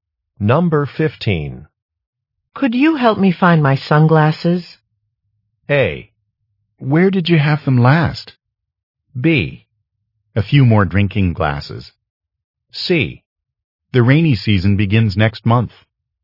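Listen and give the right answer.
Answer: A: Where did you have them last?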